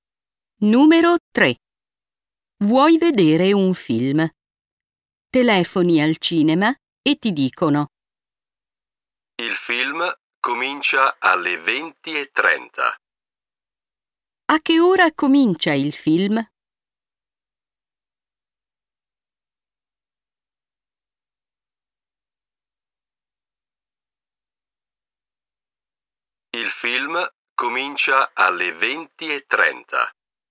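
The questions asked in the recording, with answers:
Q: A che ora comincia il film?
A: alle 20:30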